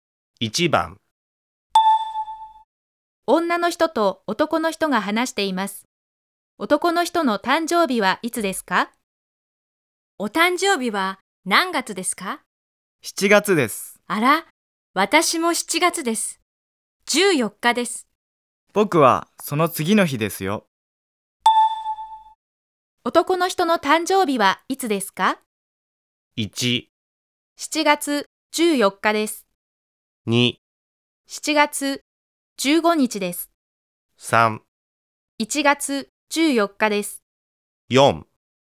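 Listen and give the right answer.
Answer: 2: 7月15日です。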